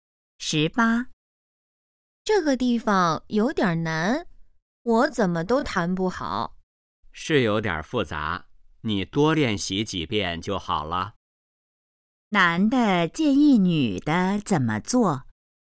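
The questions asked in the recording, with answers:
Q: 男的建议女的怎么做?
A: 多练习几遍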